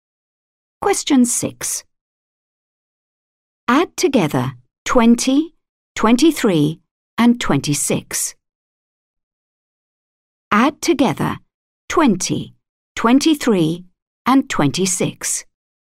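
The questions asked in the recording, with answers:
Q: Add together 20, 23, and 26.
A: 69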